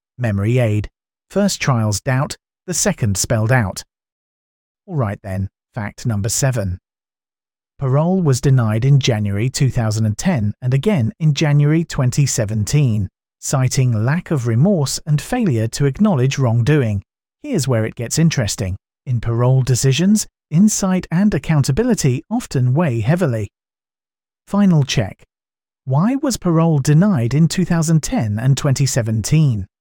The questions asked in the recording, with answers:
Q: Why was parole denied in 2010 and 2017?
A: Lack of remorse and failure to acknowledge wrongdoing.